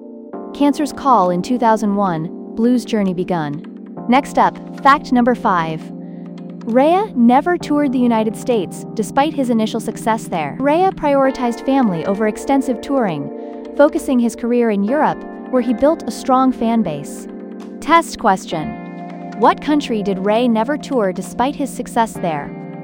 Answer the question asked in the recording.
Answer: United States.